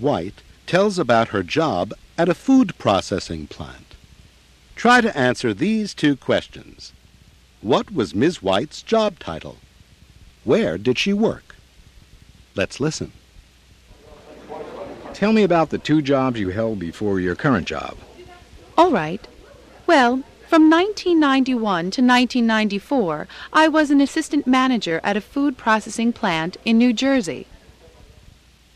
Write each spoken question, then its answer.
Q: What was Ms. White's job title?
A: She was assistant manager.

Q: Where did she work?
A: Ms. White didn't give the name of the company, but she said she worked at a food processing plant in New Jersey.